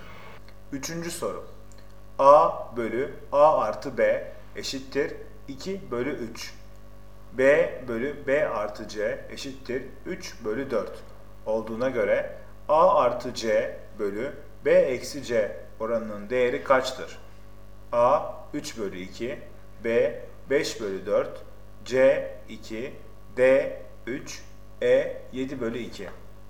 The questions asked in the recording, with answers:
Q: B bölü B artı C eşittir 3 bölü 4 olduğuna göre A artı C bölü B eksi C oranının değeri kaçtır?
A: Doğru cevap E 7 bölü 2.